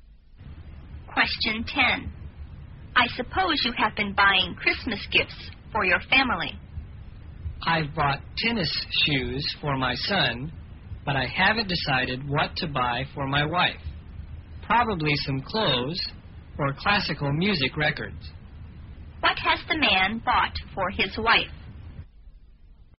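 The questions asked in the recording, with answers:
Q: What has the man bought for his wife?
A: Nothing yet; he hasn't decided.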